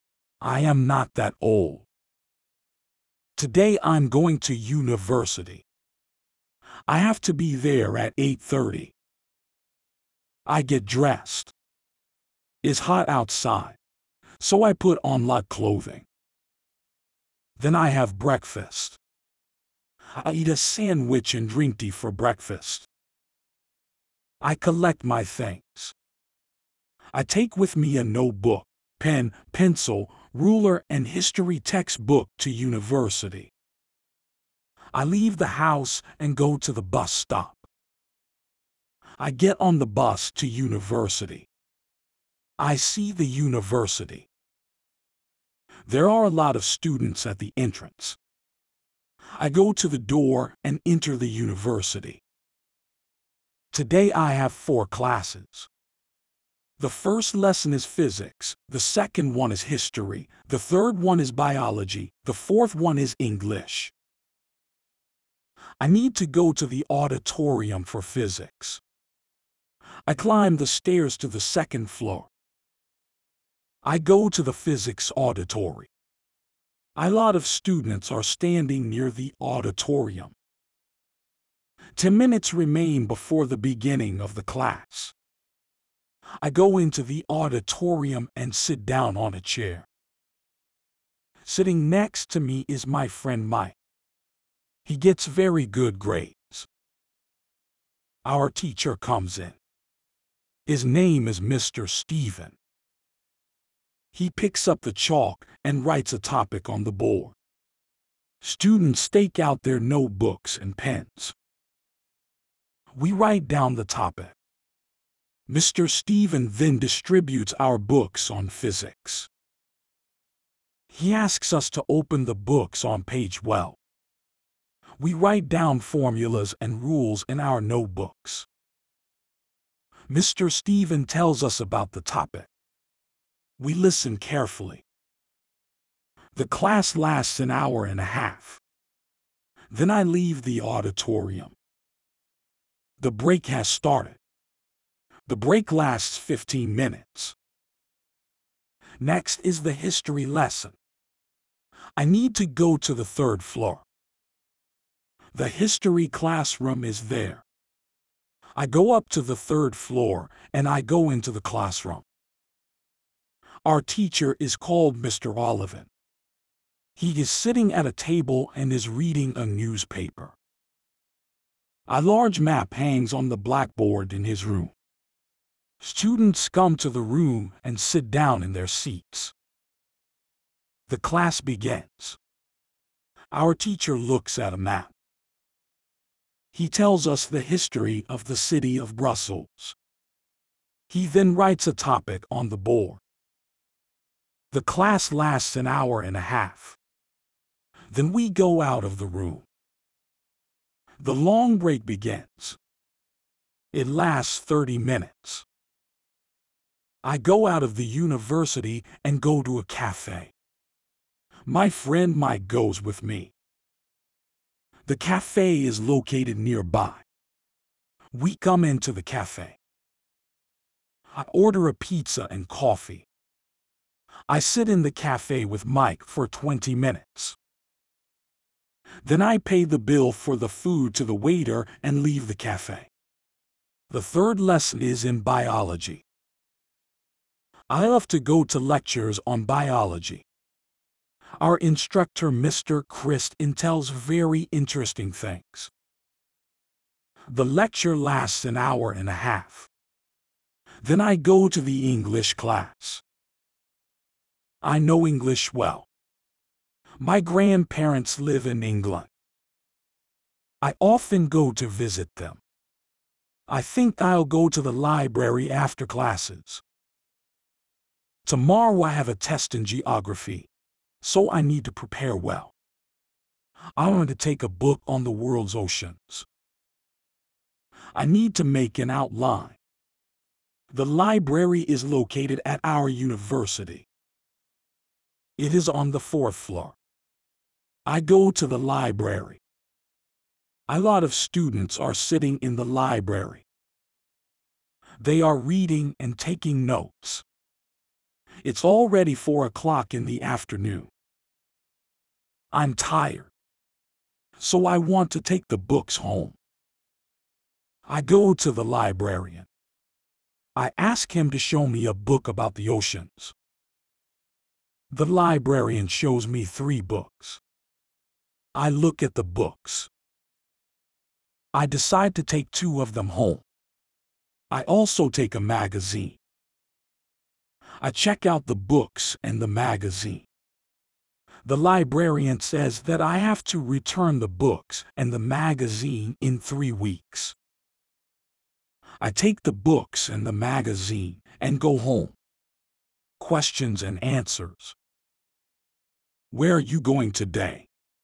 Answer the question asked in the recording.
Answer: Today I'm going to university.